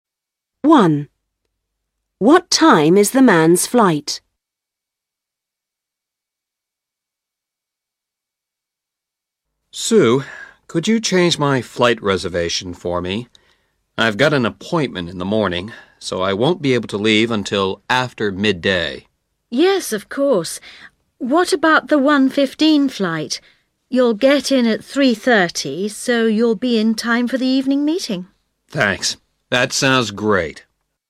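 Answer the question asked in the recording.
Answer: 1:15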